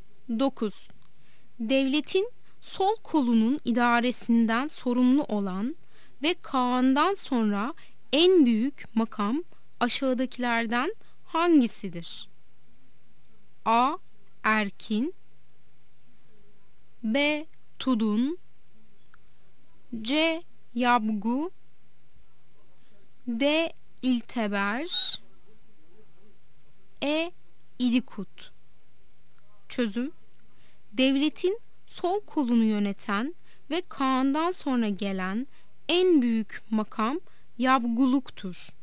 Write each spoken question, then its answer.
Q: Devletin sol kolunun idaresinden sorumlu olan ve Kaan'dan sonra en büyük makam aşağıdakilerden hangisidir?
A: Yanıt C'dir. Yabgu.